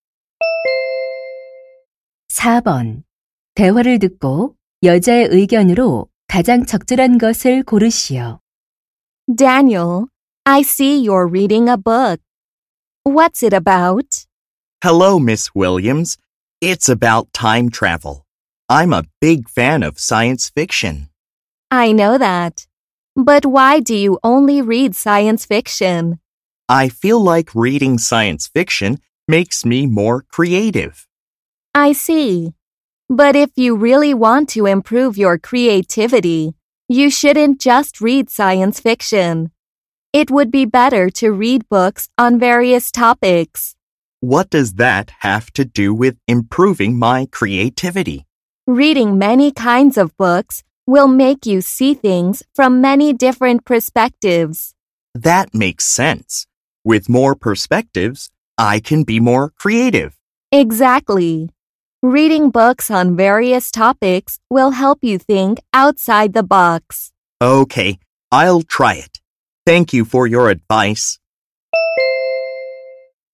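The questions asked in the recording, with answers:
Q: 대화를 듣고 여자의 의견으로 가장 적절한 것을 고르시오.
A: 다양한 주제의 책을 읽는 것이 창의력 향상에 도움이 된다.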